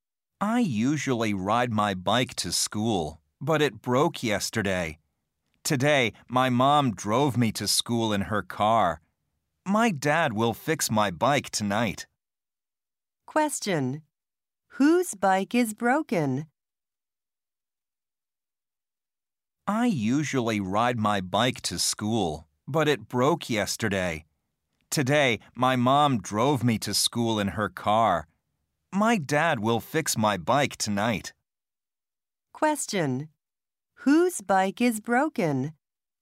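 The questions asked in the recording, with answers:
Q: Whose bike is broken?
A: The speaker's.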